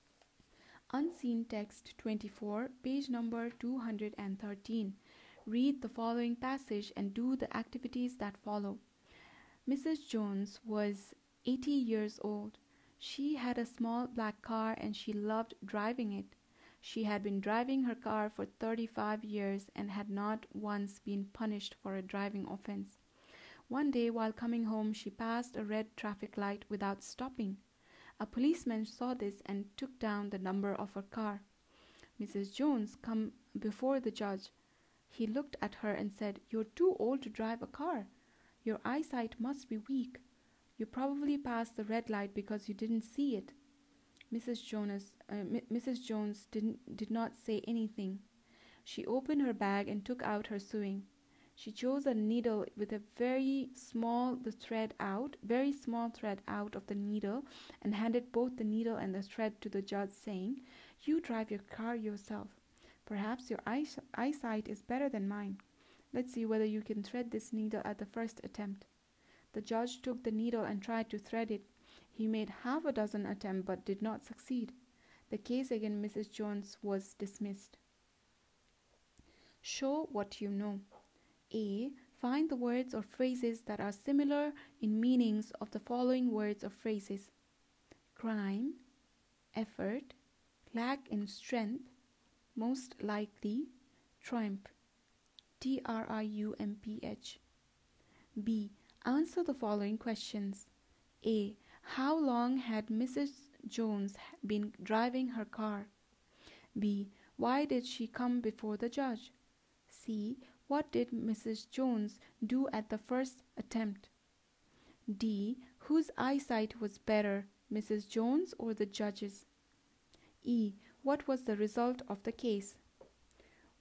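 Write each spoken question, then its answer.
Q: How long had Mrs. Jones been driving her car?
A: 35 years

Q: Why did she come before the judge?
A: She passed a red traffic light without stopping

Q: What was the result of the case?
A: The case was dismissed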